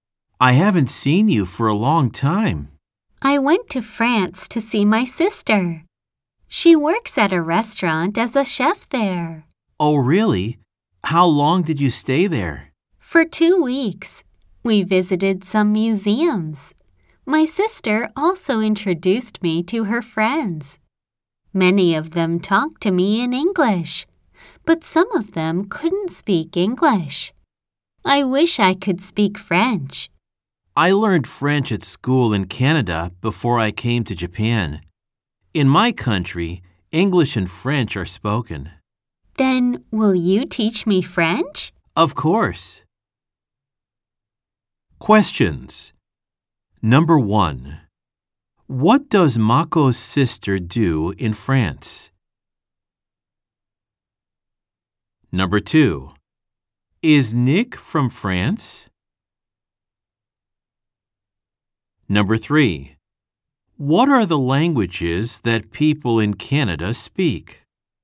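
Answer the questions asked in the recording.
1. She works at a restaurant as a chef.
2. No, he isn't.
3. English and French.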